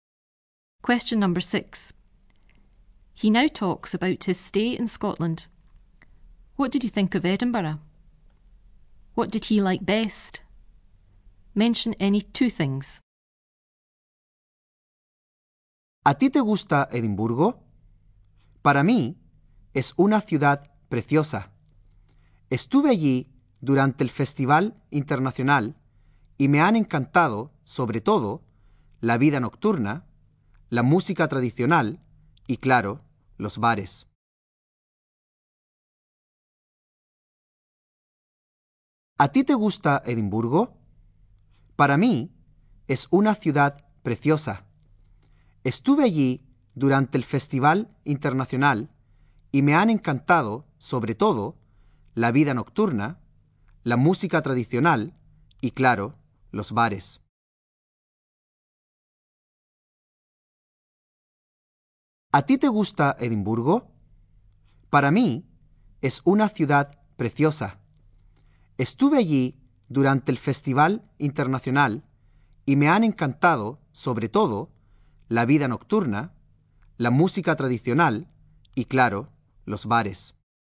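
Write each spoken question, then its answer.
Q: What did he think of Edinburgh?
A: It is a beautiful city

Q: What did he like best? Mention any 2 things.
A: Any two of: the nightlife, traditional music, the bars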